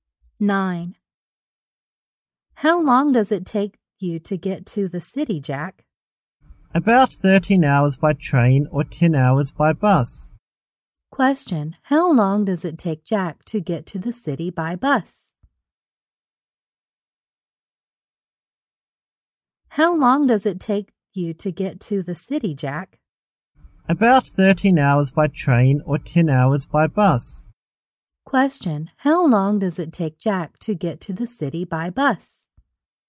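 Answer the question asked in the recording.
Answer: About 10 hours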